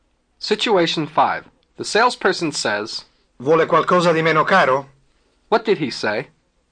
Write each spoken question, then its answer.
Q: What did he say?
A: Do you want something less expensive?